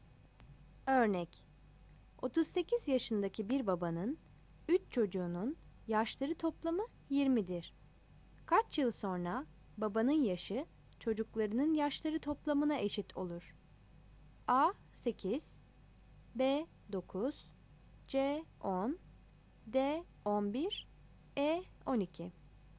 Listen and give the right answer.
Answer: Yanıt B'dir.